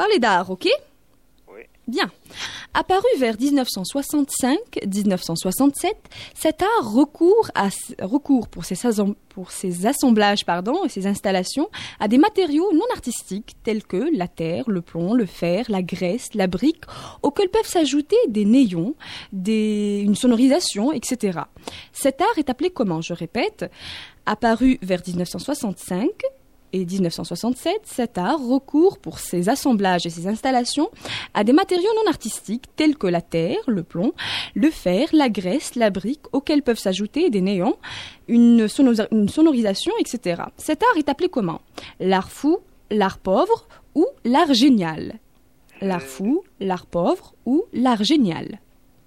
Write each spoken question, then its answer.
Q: Cet art est appelé comment?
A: On appelle ça l'art pauvre.